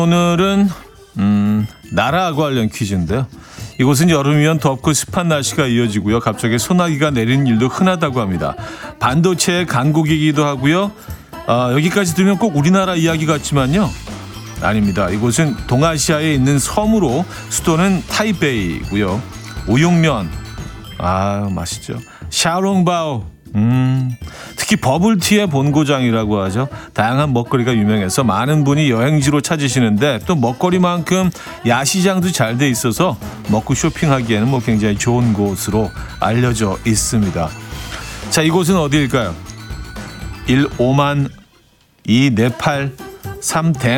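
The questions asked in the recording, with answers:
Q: 자, 이곳은 어디일까요?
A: 3: 대만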